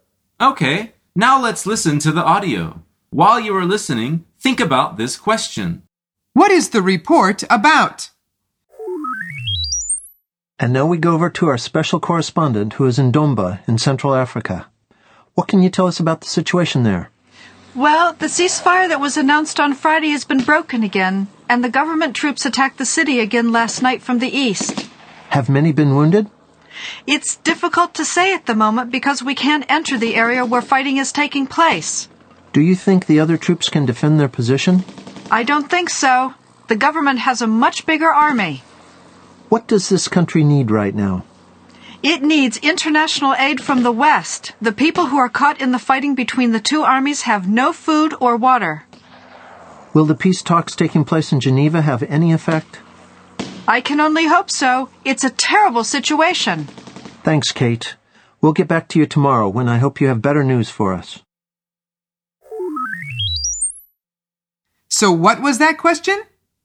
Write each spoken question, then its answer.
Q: What is the report about?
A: The answer is a war in Central Africa.